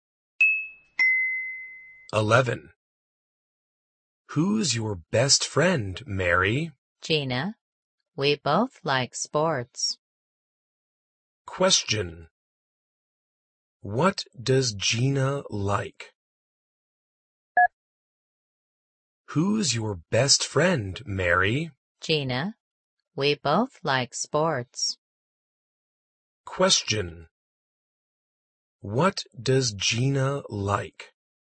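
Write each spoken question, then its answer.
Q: What does Gina like?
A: Sports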